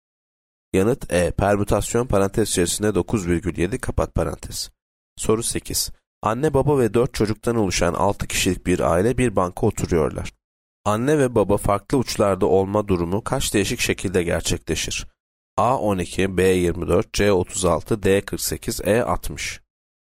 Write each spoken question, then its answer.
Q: Anne ve baba farklı uçlarda olma durumu kaç değişik şekilde gerçekleşir?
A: Yanıt D 48.